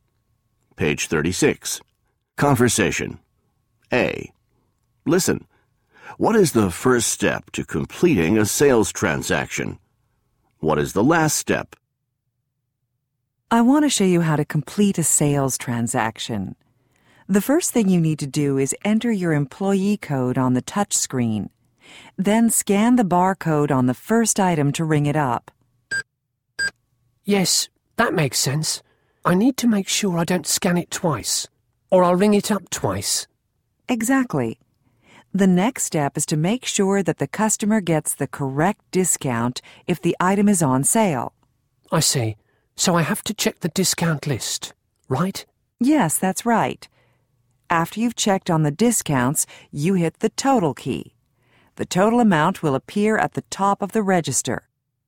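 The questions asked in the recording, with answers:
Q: What is the first step to completing a sales transaction?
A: Enter your employee code on the touch screen.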